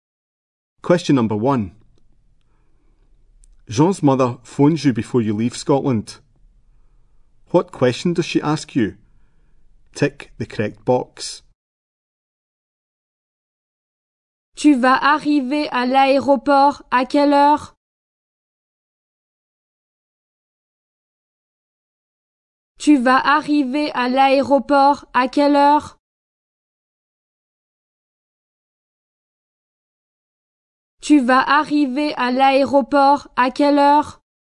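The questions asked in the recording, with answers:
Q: What question does she ask you?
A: What time you will arrive at the airport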